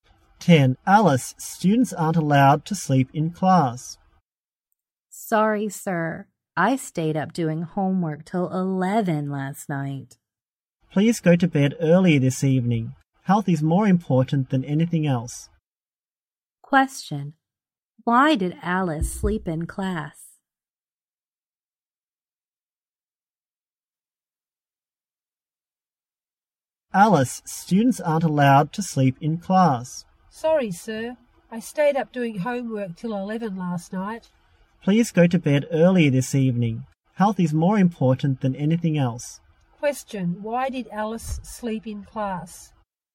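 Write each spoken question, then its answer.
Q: Question, why did Alice sleep in class?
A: She stayed up doing homework till 11 last night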